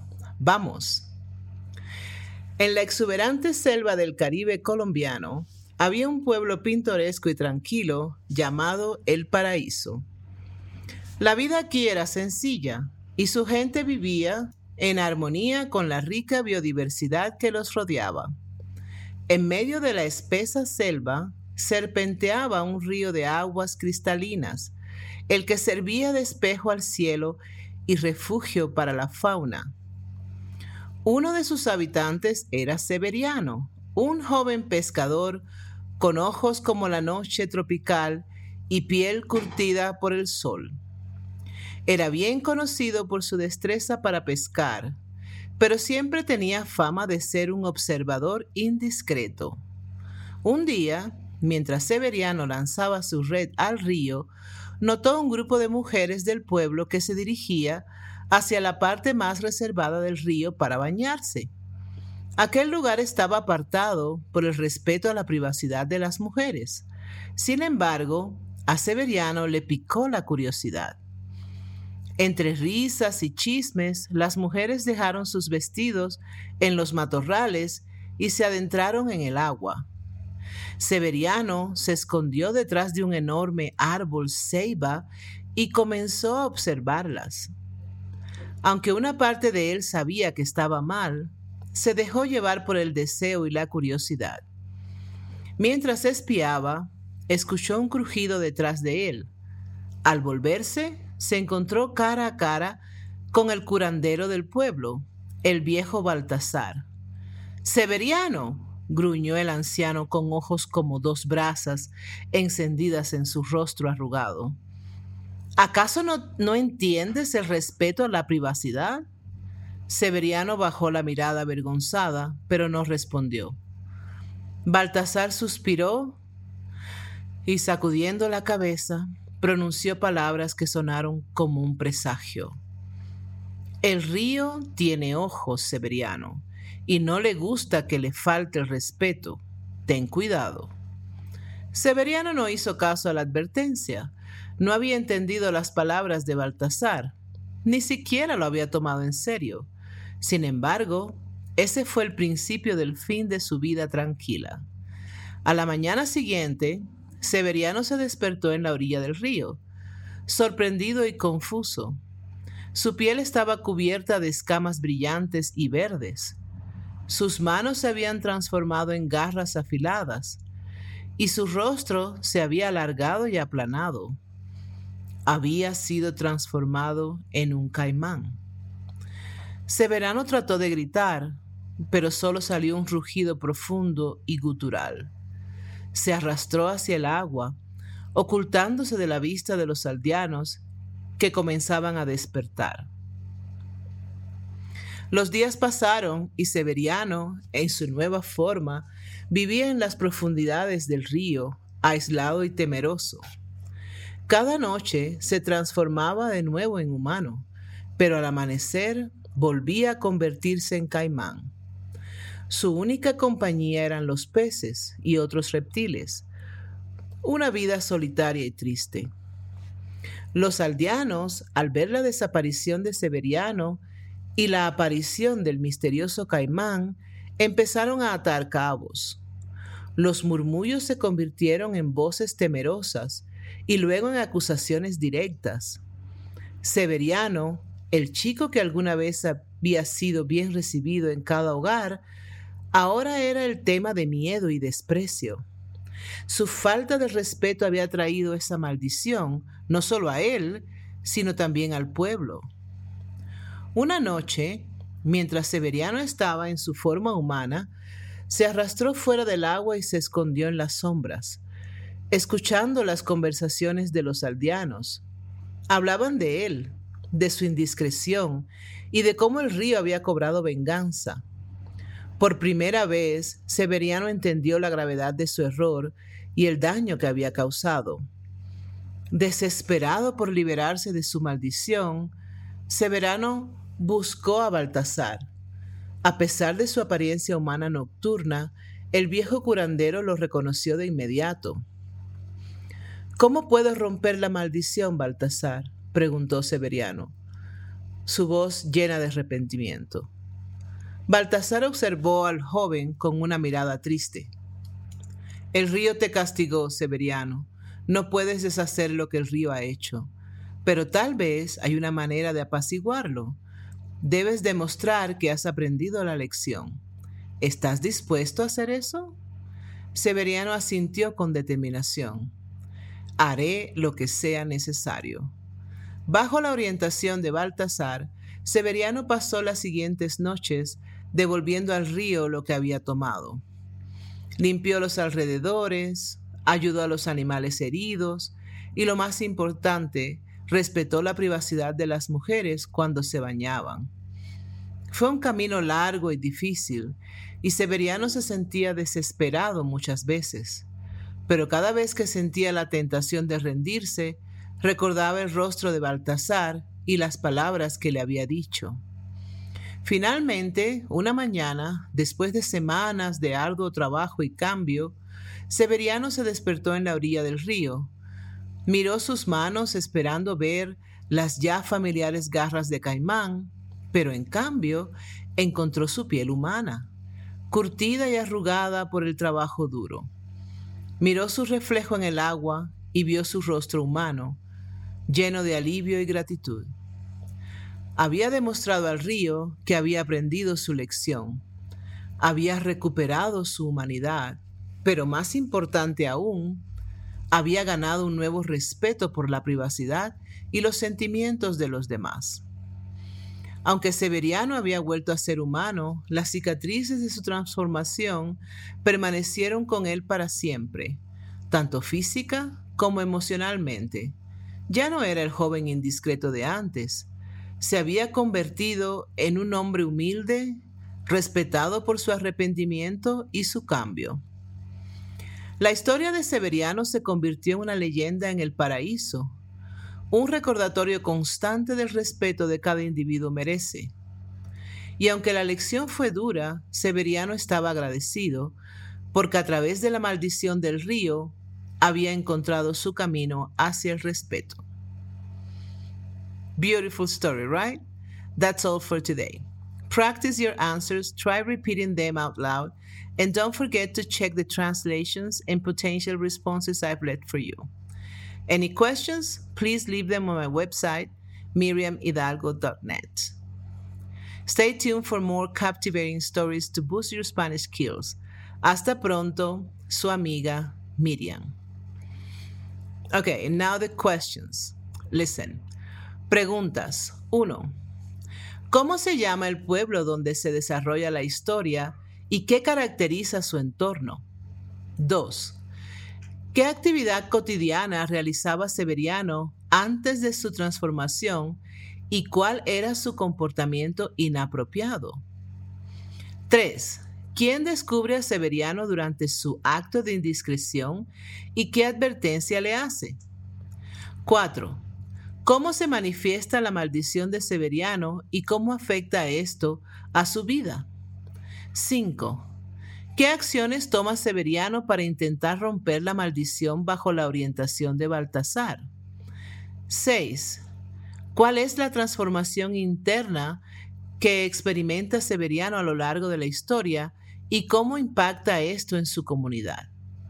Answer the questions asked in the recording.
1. El pueblo se llama Paraíso y se encuentra en la exuberante selva del Caribe colombiano. caracterizada por su biodiversidad y un río cristalino.
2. Severiano era un pescador y tenía el hábito inapropiado de espiar a las mujeres del pueblo mientras se bañaban en el río.
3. El viejo Baltasar, el curandero del pueblo, descubre a Severiano durante su acto de indiscreción y le advierte que el río tiene ojos y que no le gusta que se le falte al respeto.
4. La maldición transforma a Severiano en un caimán durante el día, lo que le obliga a vivir aislado y temeroso en las profundidades del río.
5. Severiano limpia los alrededores del río, ayuda a los animales heridos y respeta la privacidad de las mujeres cuando se bañan, todo bajo la orientación de Baltasar.
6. Severiano aprende la importancia del respeto a la privacidad y los sentimientos de los demás, transformándose de un joven indiscreto a un hombre humilde y respetado.